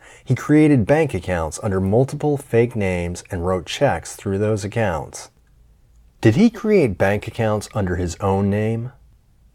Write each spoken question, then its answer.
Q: Did he create bank accounts under his own name?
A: No, he didn't create bank accounts under his own name.